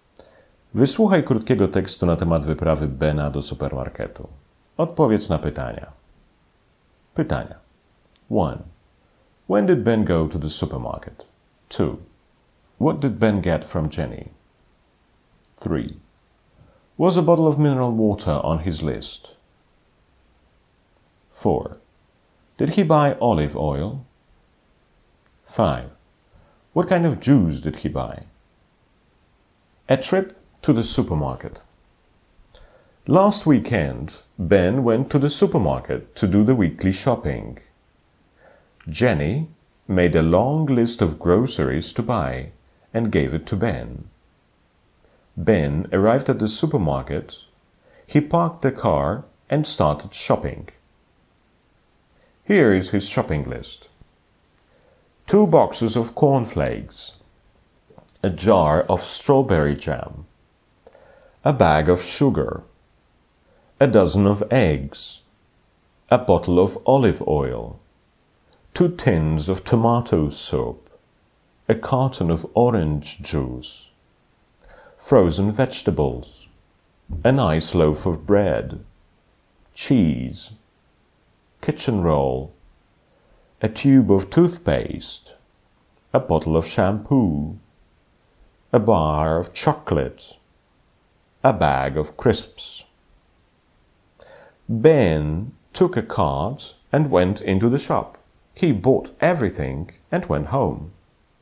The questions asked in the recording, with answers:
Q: When did Ben go to the supermarket?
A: Ben went to the supermarket last weekend.

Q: What did Ben get from Jenny?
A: Ben got a shopping list from Jenny.

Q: Was a bottle of mineral water on his list?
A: No, there wasn't.

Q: Did he buy olive oil?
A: Yes, he did.

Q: What kind of juice did he buy?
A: He bought orange juice.